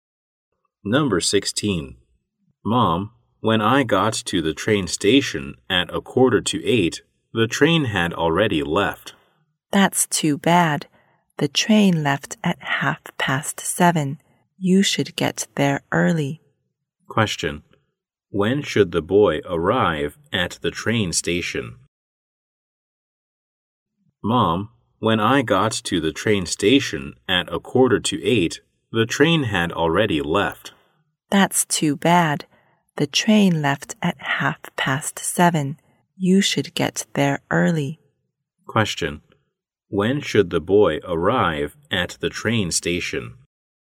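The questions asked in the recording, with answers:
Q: When should the boy arrive at the train station?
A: Before 7:30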